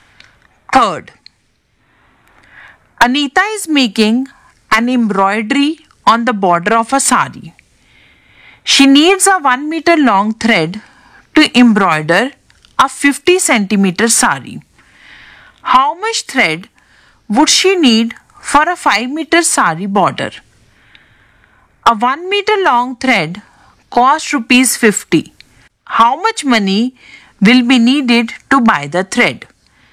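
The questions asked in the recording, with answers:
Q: How much thread would she need for a 5 meter sari border?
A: 10 meters

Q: How much money will be needed to buy the thread?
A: Rupees 500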